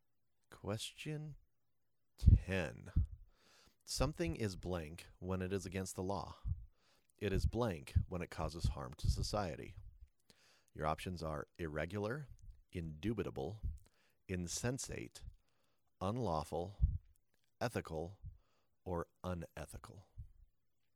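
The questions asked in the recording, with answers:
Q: Something is blank when it is against the law.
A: unlawful

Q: It is blank when it causes harm to society.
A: unethical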